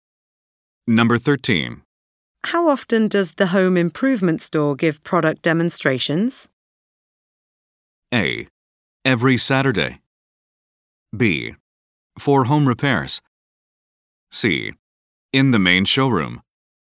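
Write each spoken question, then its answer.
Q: How often does the home improvement store give product demonstrations?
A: A: Every Saturday.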